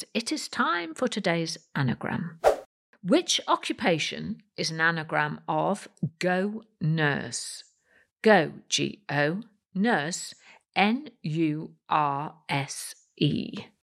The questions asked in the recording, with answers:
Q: Which occupation is an anagram of Go Nurse?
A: And the answer is surgeon, S U R G E O N.